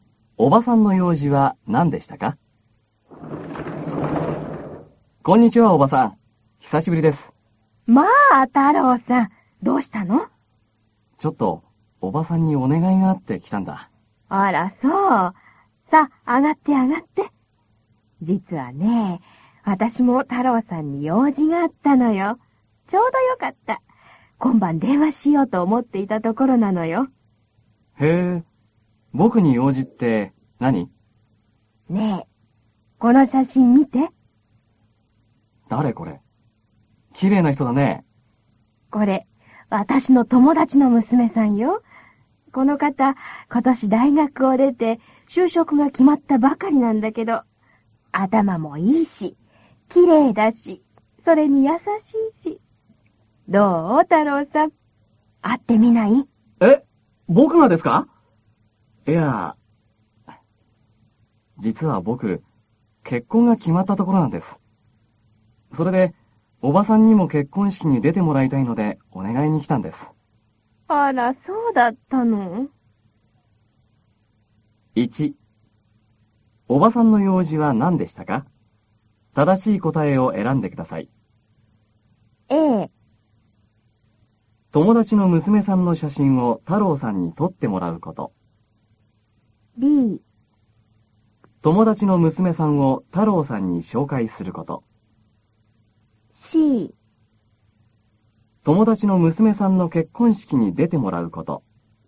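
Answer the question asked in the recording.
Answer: B: 友達の娘さんを太郎さんに紹介すること。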